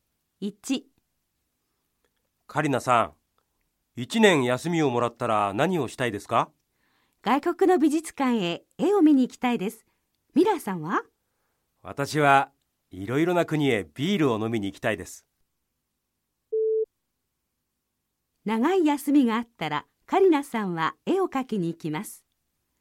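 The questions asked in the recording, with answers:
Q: 長い休みがあったらカリナさんは絵を描きに行きます。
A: ×(誤り):カリナさんは外国の美術館へ絵を見に行きたい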